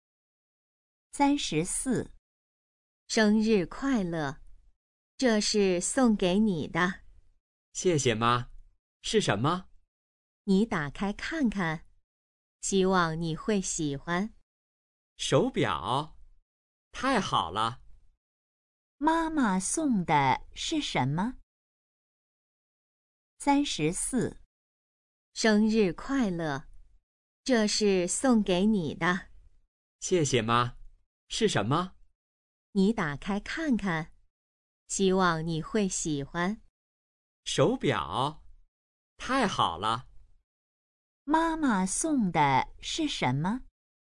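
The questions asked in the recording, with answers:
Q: 妈妈送的是什么?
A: 手表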